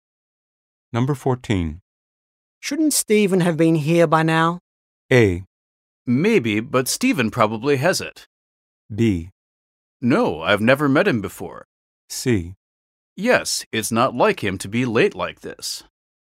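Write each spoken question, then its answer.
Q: Shouldn't Stephen have been here by now?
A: C: Yes, it's not like him to be late like this.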